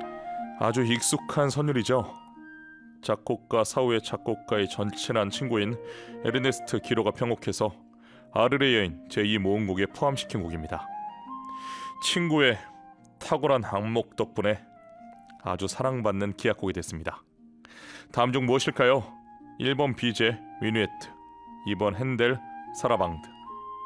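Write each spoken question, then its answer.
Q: 다음 중 무엇일까요? 1번 비제, 미누에트, 2번 핸델, 사라방드.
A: 1: 비제, 미누에트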